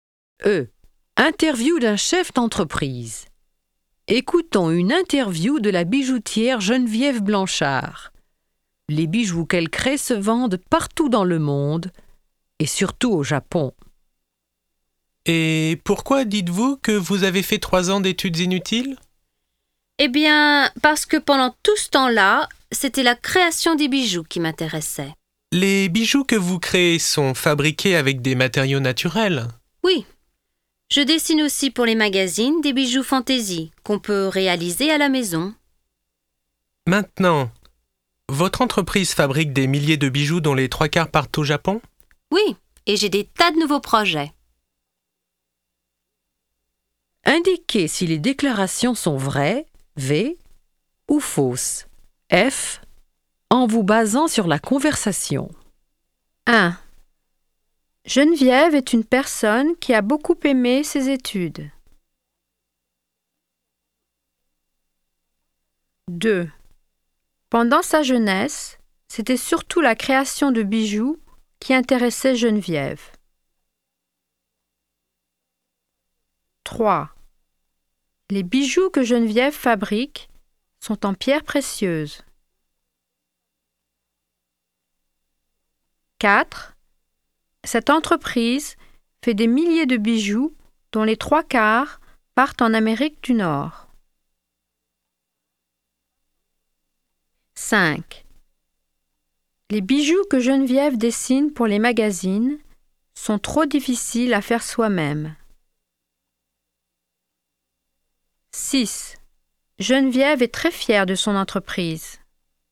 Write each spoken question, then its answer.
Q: Geneviève est une personne qui a beaucoup aimé ses études.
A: 1. Faux.

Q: Pendant sa jeunesse, c'était surtout la création de bijoux qui intéressait Geneviève.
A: 2. Vrai.

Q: Les bijoux que Geneviève fabrique sont en pierres précieuses.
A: 3. Faux.

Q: Cette entreprise fait des milliers de bijoux dont les 3/4 partent en Amérique du Nord.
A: 4. Faux.

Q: Les bijoux que Geneviève dessine pour les magazines sont trop difficiles à faire soi-même.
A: 5. Faux.